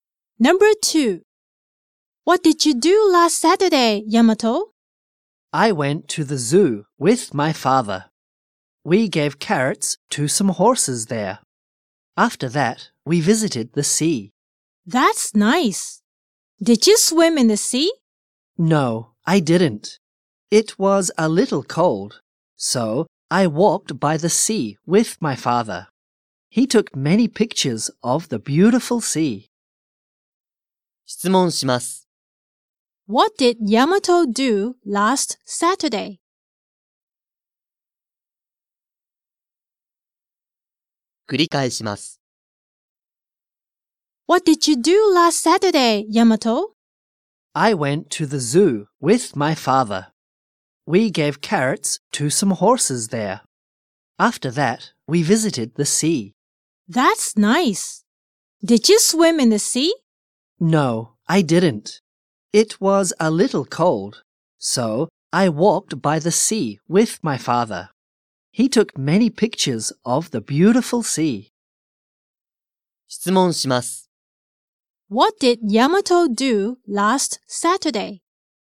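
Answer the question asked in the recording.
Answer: He went to the zoo with his father, fed carrots to horses, and walked by the sea.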